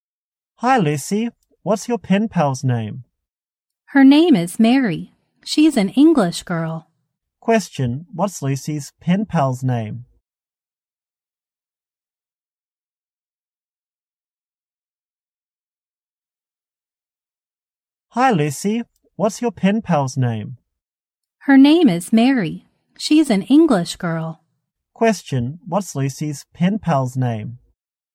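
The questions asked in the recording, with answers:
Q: what's Lucy's pen pal's name?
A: Mary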